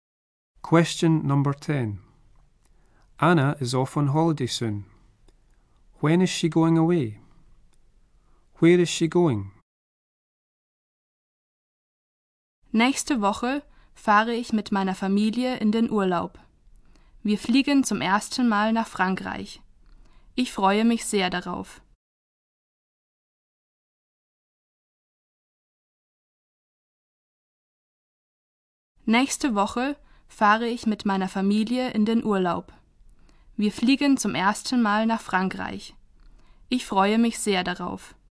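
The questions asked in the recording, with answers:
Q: When is she going away?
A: Next week

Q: Where is she going?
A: France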